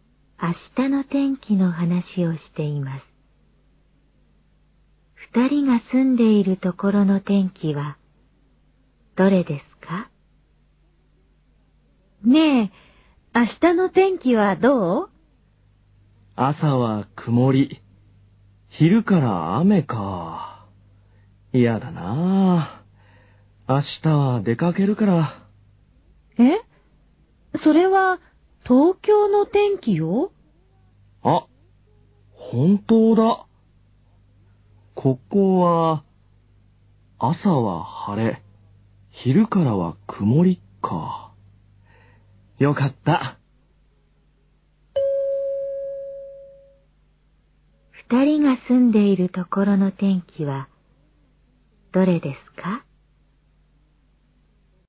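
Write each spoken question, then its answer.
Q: 二人が住んでいるところの天気はどれですか?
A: 朝は晴れ、昼からは曇り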